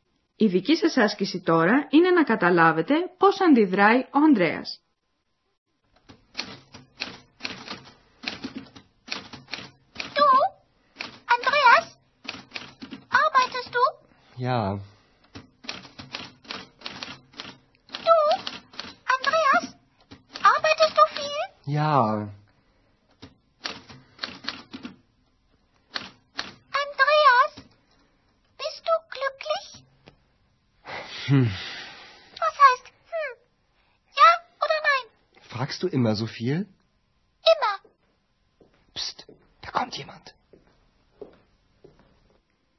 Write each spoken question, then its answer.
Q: Η δική σας άσκηση τώρα είναι να καταλάβετε πώς αντιδράει ο Ανδρέας.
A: Στην ερώτηση της Εξ, ο Ανδρέας μουρμουρίζει κάτι αναποφάσιστα και αντί άλλης απάντησης της κάνει την αντερώτηση, αν ρωτάει πάντοτε τόσα πολλά.